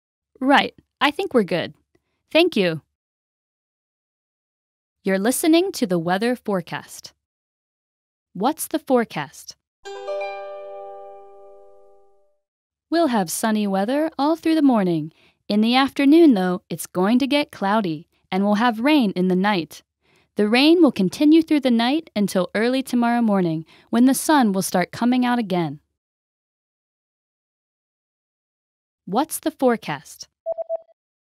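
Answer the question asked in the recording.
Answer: Sunny in the morning, cloudy in the afternoon, rain at night until early tomorrow morning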